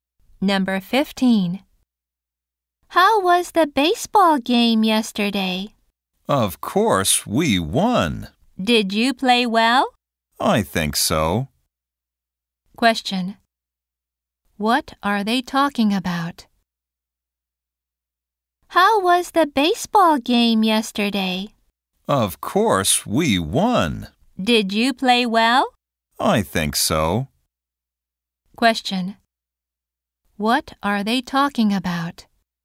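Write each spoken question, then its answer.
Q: What are they talking about?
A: A baseball game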